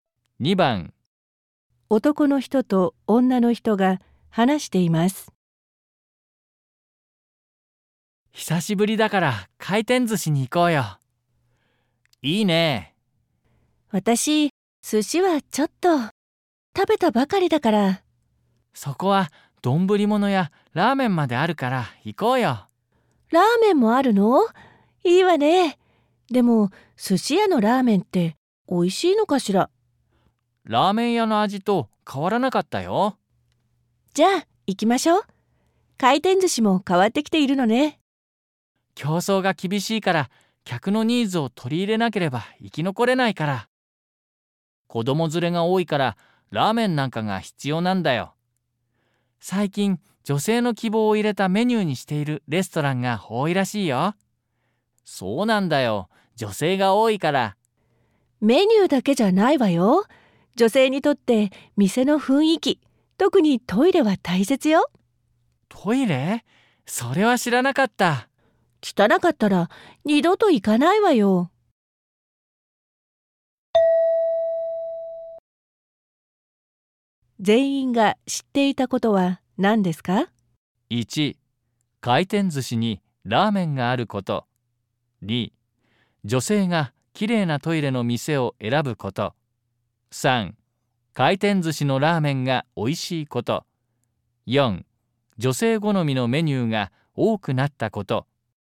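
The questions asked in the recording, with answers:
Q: 全員が知っていたことは何ですか?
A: 4: 女性好みのメニューが多くなったこと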